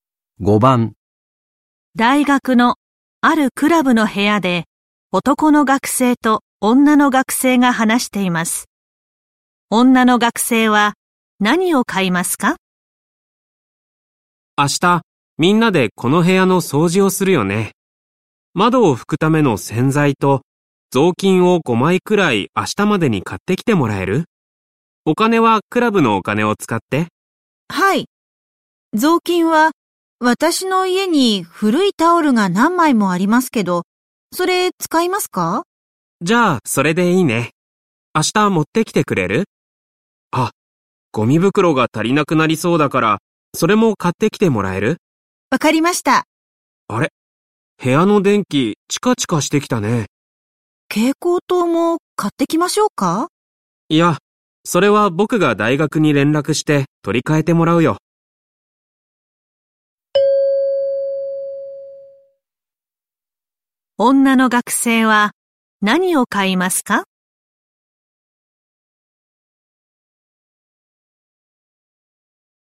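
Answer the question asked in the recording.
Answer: 窓を拭くための洗剤とゴミ袋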